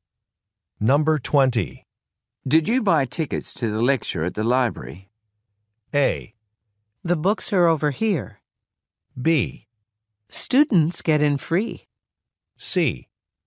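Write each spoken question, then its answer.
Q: Did you buy tickets to the lecture at the library?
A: B: Students get in free.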